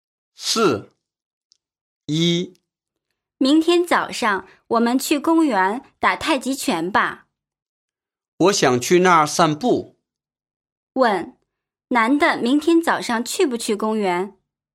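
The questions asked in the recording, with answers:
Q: 问,男的明天早上去不去公园?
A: 去,他想去那儿散步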